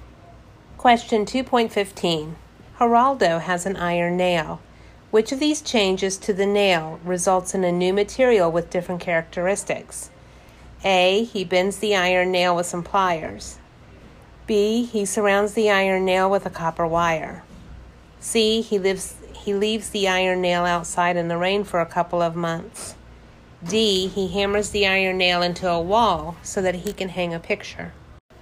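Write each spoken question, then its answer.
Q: Which of these changes to the nail results in a new material with different characteristics?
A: C: He leaves the iron nail outside in the rain for a couple of months.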